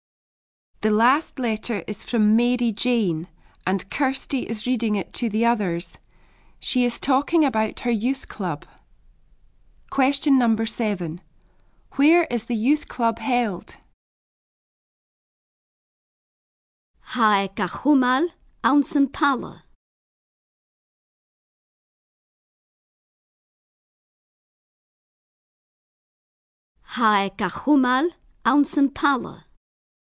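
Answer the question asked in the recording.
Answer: In the hall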